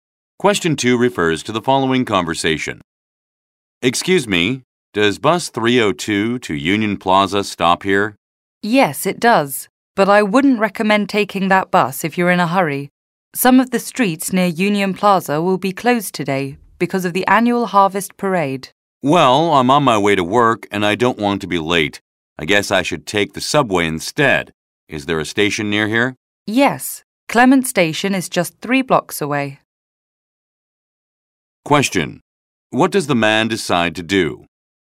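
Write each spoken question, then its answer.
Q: What does the man decide to do?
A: Take the subway instead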